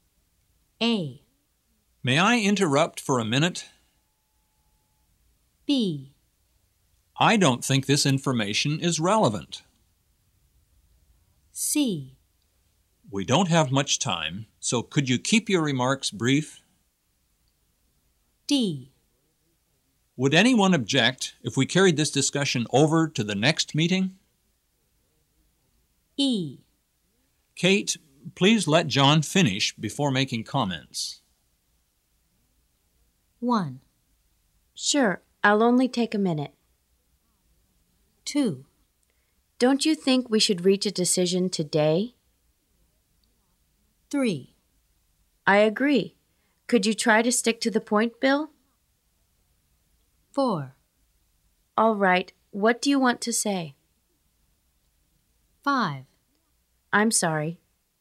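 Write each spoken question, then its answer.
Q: Sure, I'll only take a minute.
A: C: We don't have much time, so could you keep your remarks brief?

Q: Don't you think we should reach a decision today?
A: D: Would anyone object if we carried this discussion over to the next meeting?

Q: I agree. Could you try to stick to the point, Bill?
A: B: I don't think this information is relevant.

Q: All right, what do you want to say?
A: A: May I interrupt for a minute?

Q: I'm sorry.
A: E: Kate, please let John finish before making comments.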